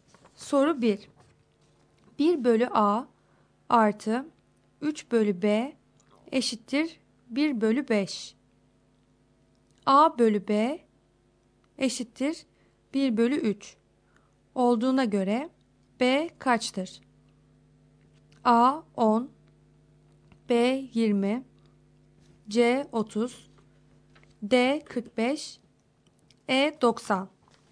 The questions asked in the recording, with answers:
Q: A bölü B eşittir 1 bölü 3 olduğuna göre B kaçtır?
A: Doğru cevap C şıkkı.